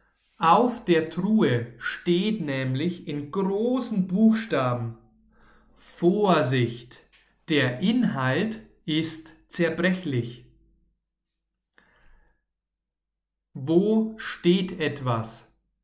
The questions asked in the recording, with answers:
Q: Wo steht etwas?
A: Auf der Truhe.